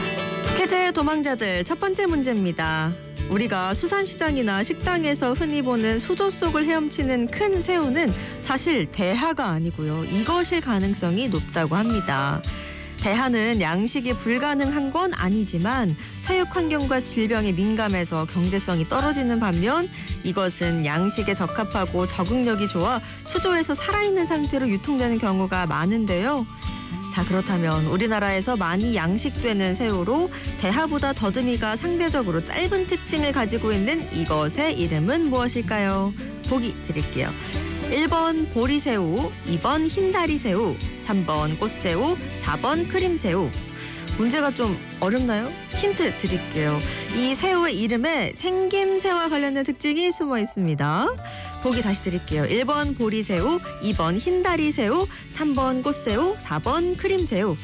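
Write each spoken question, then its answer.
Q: 자, 그렇다면 우리나라에서 많이 양식되는 새우로 대하보다 더듬이가 상대적으로 짧은 특징을 가지고 있는 이것의 이름은 무엇일까요?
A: 2번: 흰다리새우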